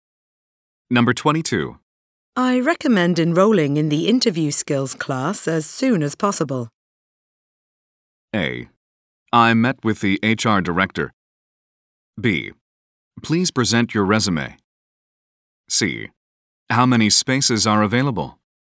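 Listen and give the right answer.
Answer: C: How many spaces are available?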